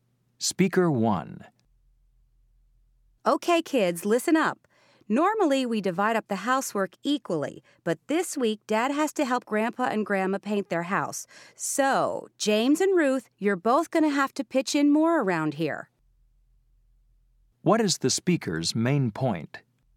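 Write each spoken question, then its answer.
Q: What is the speaker's main point?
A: This week the kids (James and Ruth) must do more housework because Dad is helping the grandparents.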